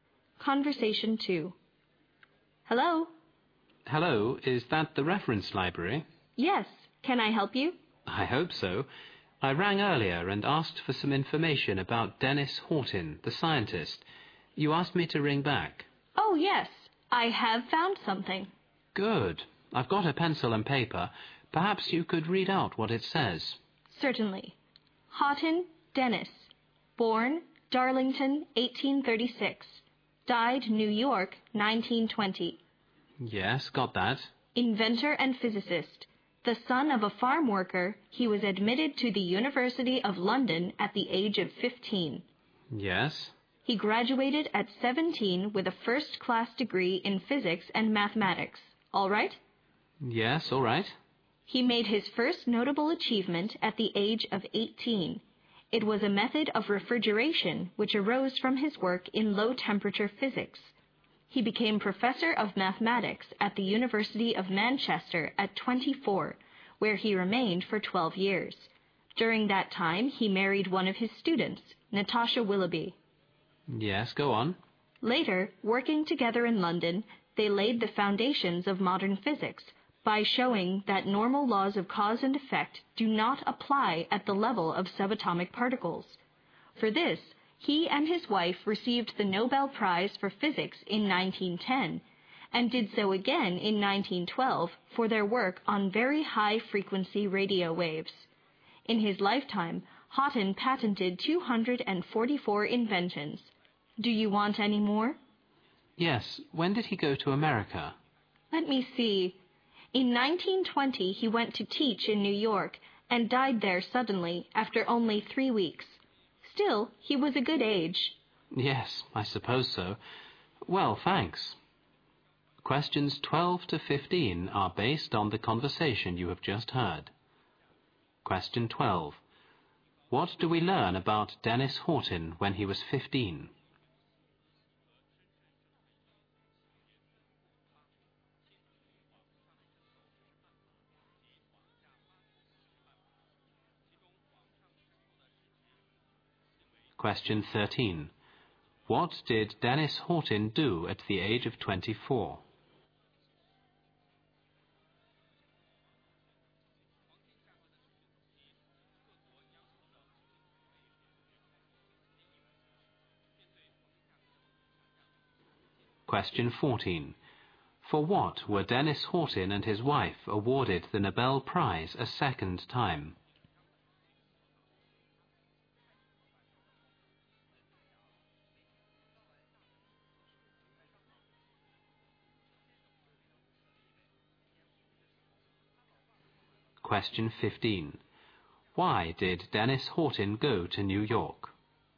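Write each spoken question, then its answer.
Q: What do we learn about Dennis Horton when he was 15?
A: He was admitted to the University of London.

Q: What did Dennis Horton do at the age of 24?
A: He became professor of mathematics at the University of Manchester.

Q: For what were Dennis Horton and his wife awarded the Nobel Prize a second time?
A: Their work on very high-frequency radio waves.

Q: Why did Dennis Horton go to New York?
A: To teach there.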